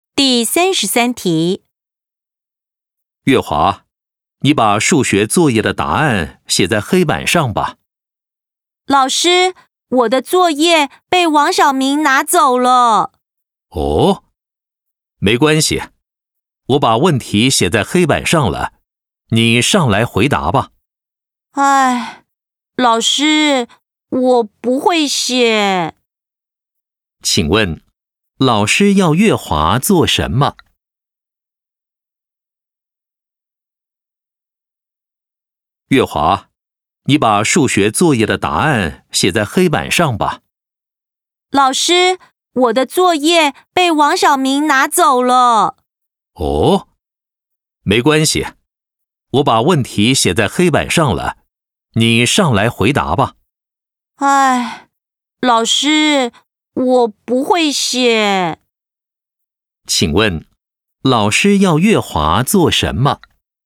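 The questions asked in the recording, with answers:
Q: 请问,老师要月华做什么?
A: 到黑板上写数学作业的答案(上黑板回答问题)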